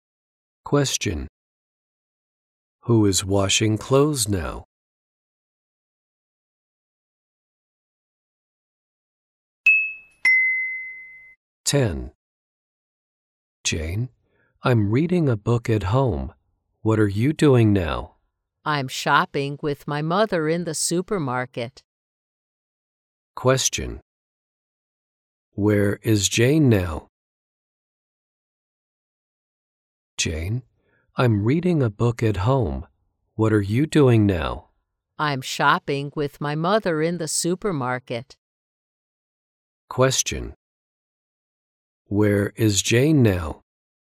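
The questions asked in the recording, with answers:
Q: Where is Jane now?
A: In the supermarket.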